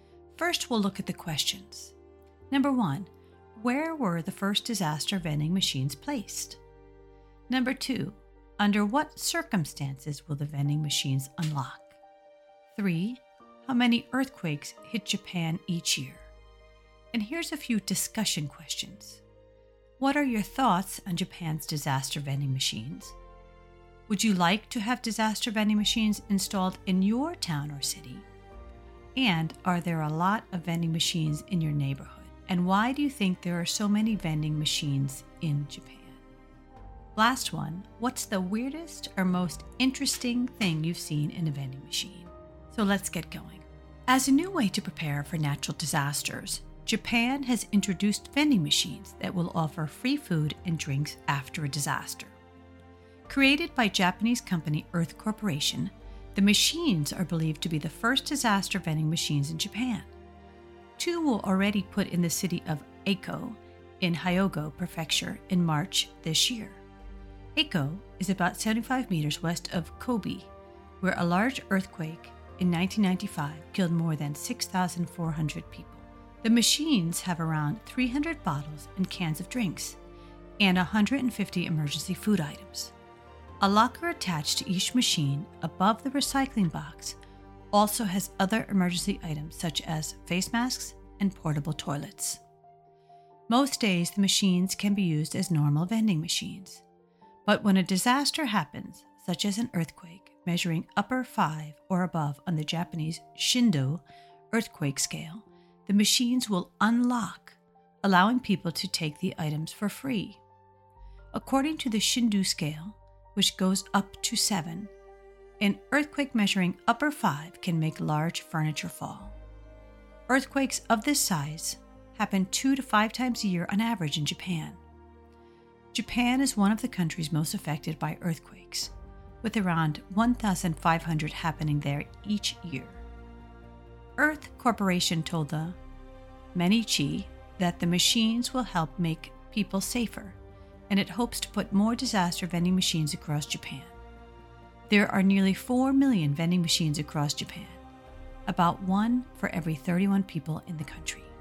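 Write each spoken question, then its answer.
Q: where were the first disaster vending machines placed?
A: In the city of Eiko (Ako) in Hyogo Prefecture

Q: under what circumstances will the vending machines unlock?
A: When a disaster happens, such as an earthquake measuring upper 5 or above on the Shindo scale

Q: how many earthquakes hit Japan each year?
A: Around 1,500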